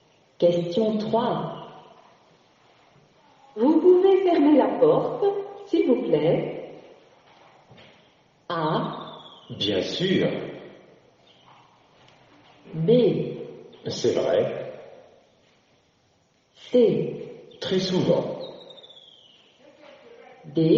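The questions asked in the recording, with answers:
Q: Vous pouvez fermer la porte, s'il vous plaît?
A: A: Bien sûr.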